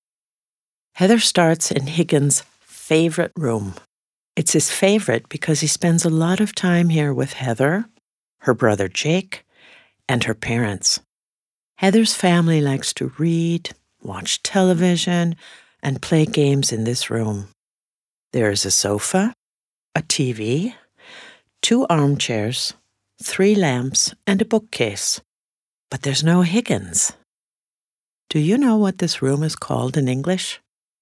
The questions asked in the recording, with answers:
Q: Do you know what this room is called in English?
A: That's right. It's the living room.